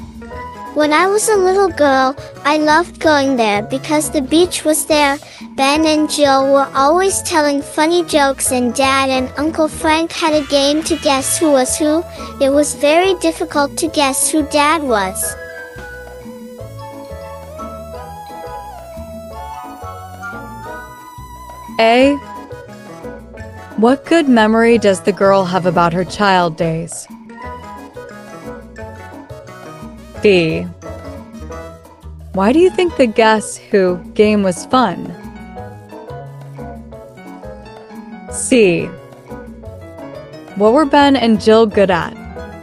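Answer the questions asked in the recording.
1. Going to Uncle Frank's beach house, where the beach was
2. Telling funny jokes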